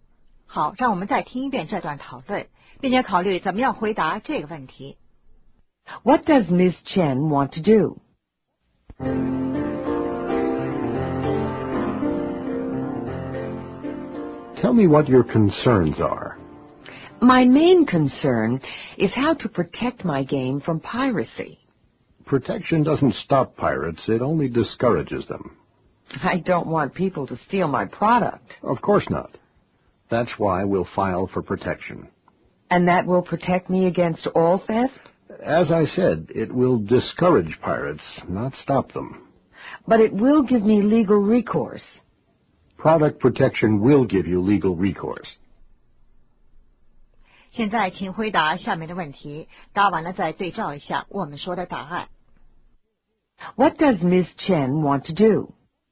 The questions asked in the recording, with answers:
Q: What does Ms. Chen want to do?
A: Protect her product.